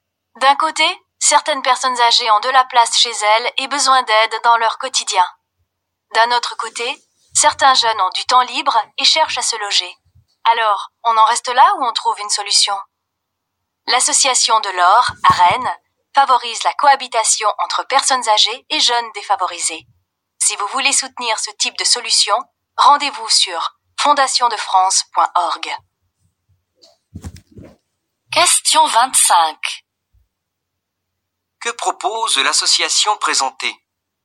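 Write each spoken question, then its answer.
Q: Que propose l'association présentée ?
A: Elle favorise la cohabitation entre personnes âgées et jeunes défavorisés.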